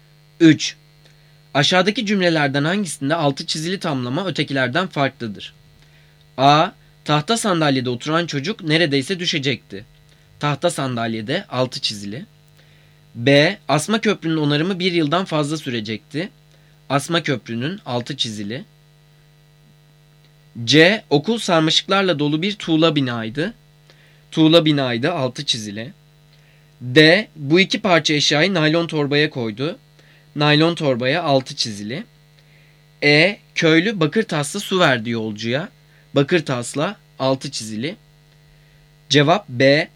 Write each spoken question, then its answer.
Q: Aşağıdaki cümlelerden hangisinde altı çizili tamlama ötekilerden farklıdır?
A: Cevap B.